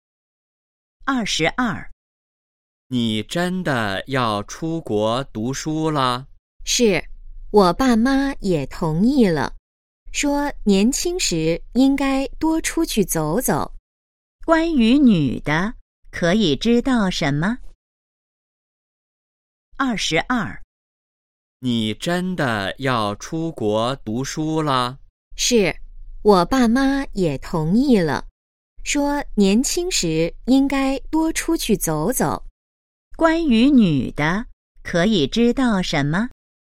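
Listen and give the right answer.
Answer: 她要出国读书了,父母也同意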